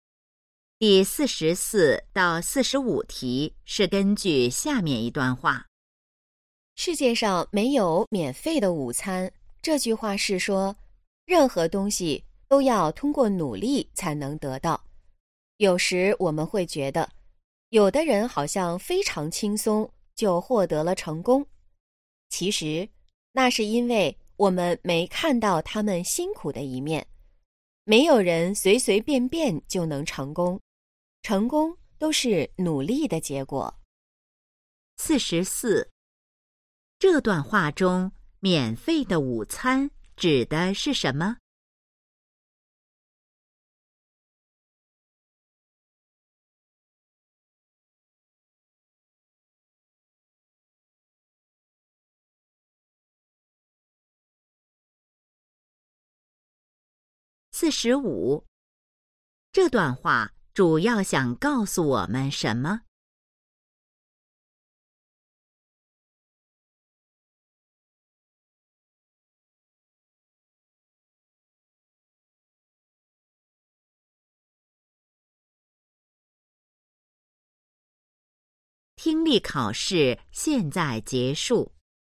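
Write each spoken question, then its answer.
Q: 这段话中,免费的午餐指的是什么?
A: 不需要努力就能得到的东西

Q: 这段话主要想告诉我们什么?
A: 成功都是努力的结果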